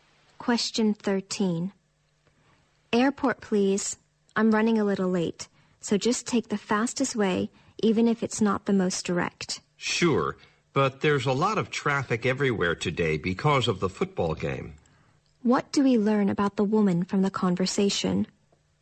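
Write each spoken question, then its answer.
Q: What do we learn about the woman from the conversation?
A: She is running late and in a hurry to get to the airport.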